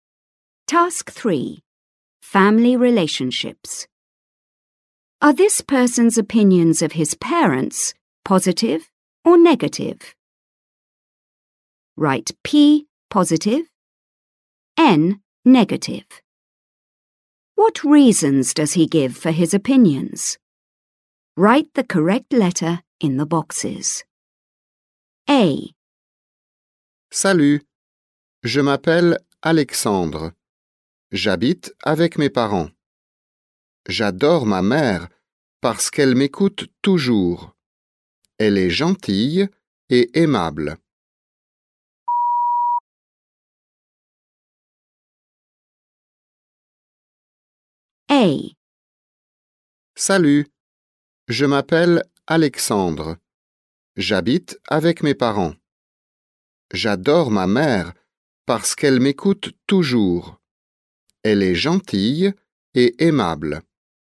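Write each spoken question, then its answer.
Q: Are this person's opinions of his parents positive or negative?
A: P: positive (about his mother)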